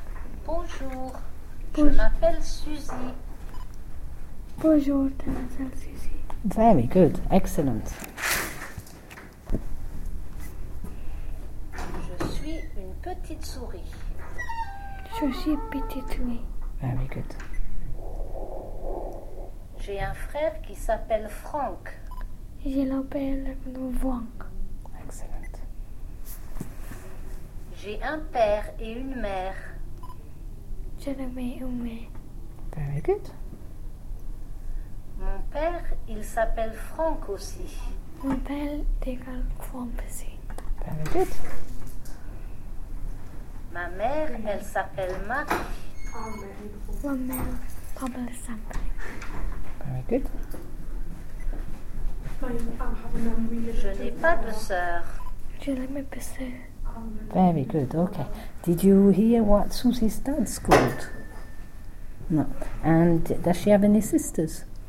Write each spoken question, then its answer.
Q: And does she have any sisters?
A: So she hasn't got any sisters.